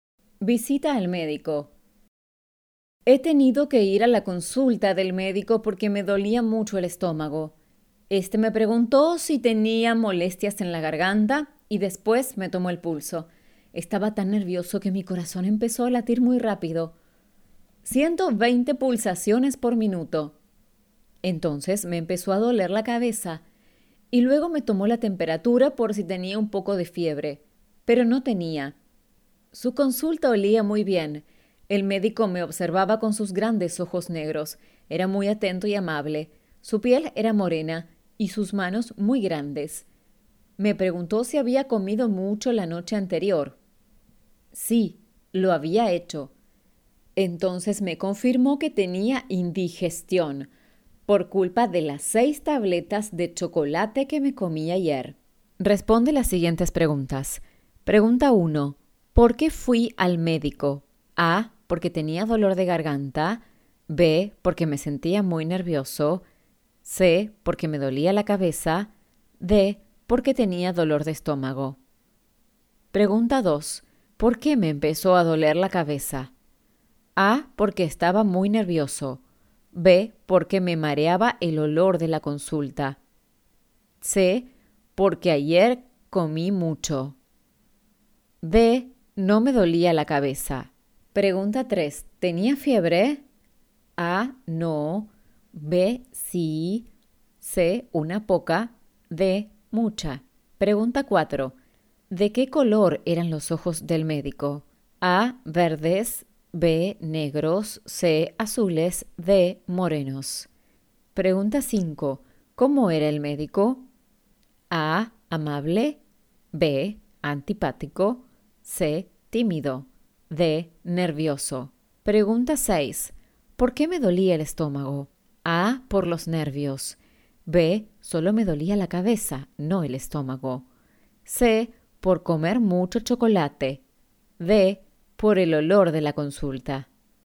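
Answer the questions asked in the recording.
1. D: Porque tenía dolor de estómago.
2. A: Porque estaba muy nervioso.
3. A: No.
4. B: Negros.
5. A: Amable.
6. C: Por comer mucho chocolate.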